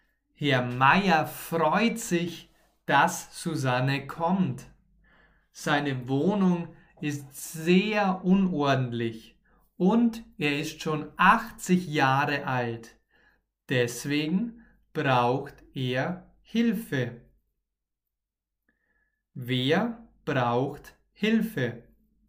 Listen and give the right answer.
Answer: Herr Meier, Herr Meier braucht Hilfe.